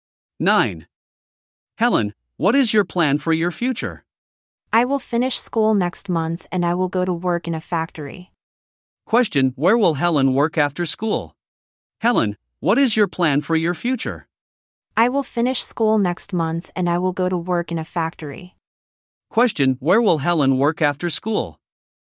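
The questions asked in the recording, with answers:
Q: Question: Where will Helen work after school?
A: In a factory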